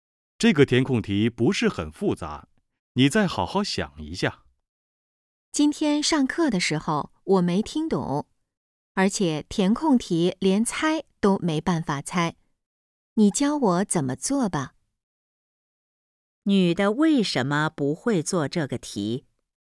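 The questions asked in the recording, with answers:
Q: 女的为什么不会做这个题?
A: 上课时没听懂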